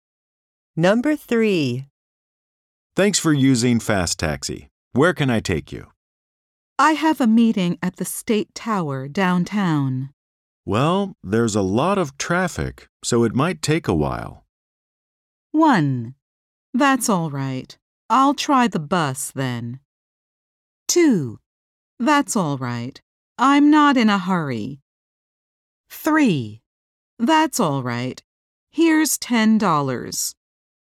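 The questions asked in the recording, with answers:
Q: Well, there's a lot of traffic, so it might take a while.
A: 2: That's all right. I'm not in a hurry.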